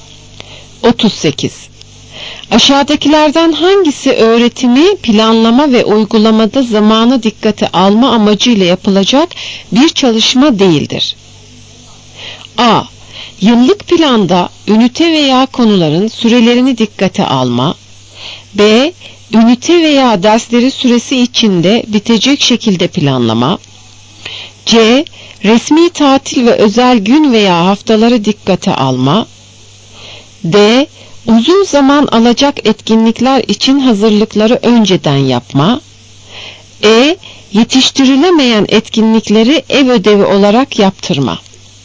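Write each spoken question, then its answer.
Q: Aşağıdakilerden hangisi öğretimi, planlama ve uygulamada zamanı dikkate alma amacıyla yapılacak bir çalışma değildir?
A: E: Yetiştirilemeyen etkinlikleri ev ödevi olarak yaptırma.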